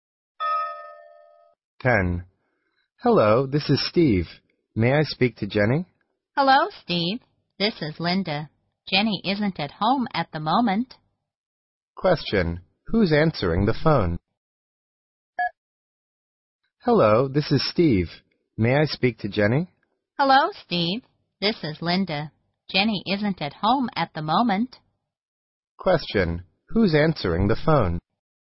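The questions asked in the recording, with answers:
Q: Who's answering the phone?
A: Linda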